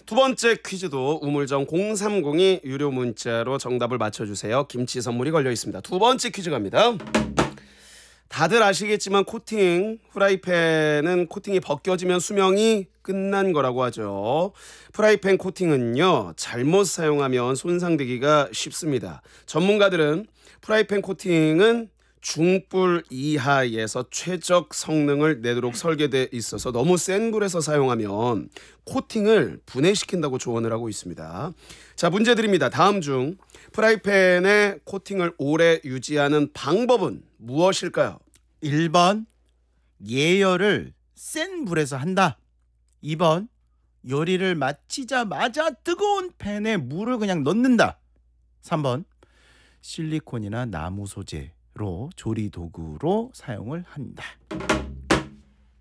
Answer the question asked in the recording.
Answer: 정답은 3번 실리콘이나 나무 소재로 이 조리 도구를 사용한다.